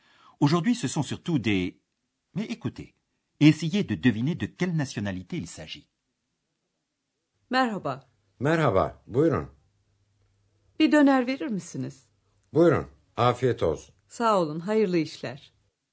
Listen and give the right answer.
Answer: Oui, c'était du turc.